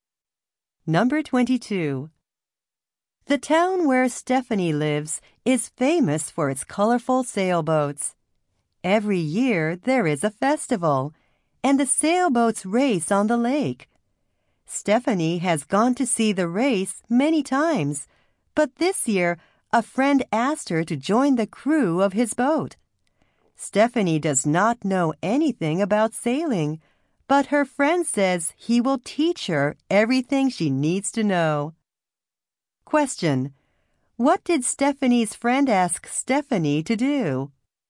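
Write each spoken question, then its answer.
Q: What did Stephanie's friend ask Stephanie to do?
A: Join the crew of his boat in the race.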